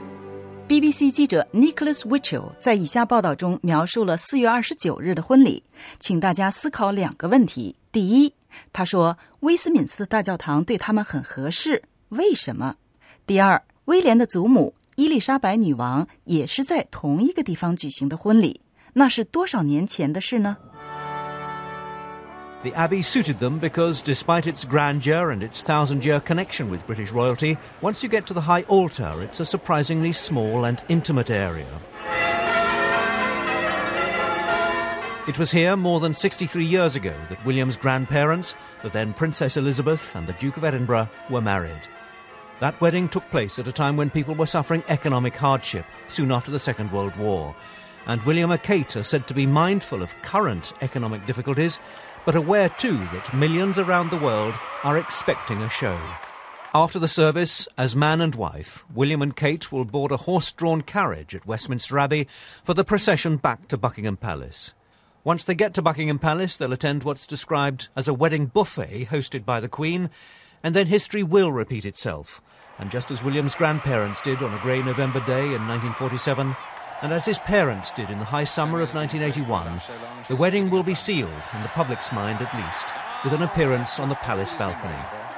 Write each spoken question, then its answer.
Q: 第二,威廉的祖母伊丽莎白女王也是在同一个地方举行的婚礼,那是多少年前的事呢?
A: The answer? 63 years ago in 1947.